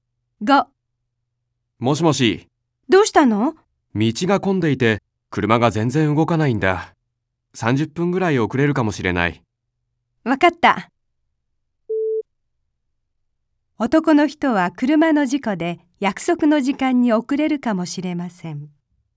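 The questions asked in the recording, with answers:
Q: 男の人は車の事故で約束の時間に遅れるかもしれません。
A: ×(道が混んでいるから)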